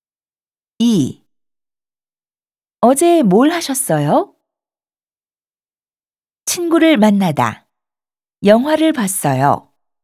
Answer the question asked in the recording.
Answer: 친구를 만나서 영화를 봤어요.